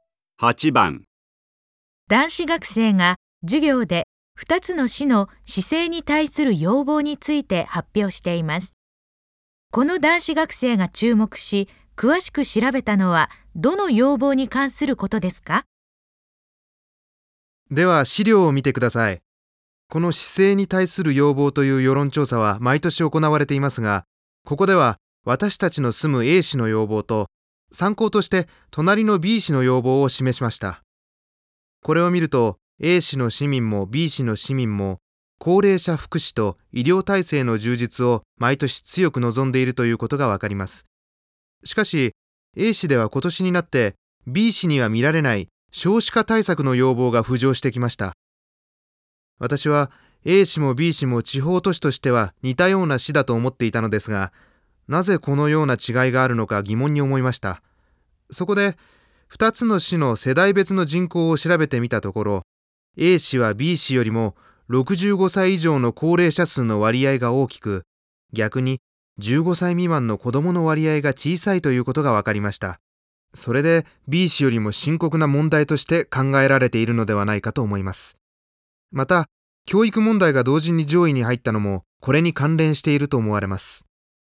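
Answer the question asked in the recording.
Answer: 少子化対策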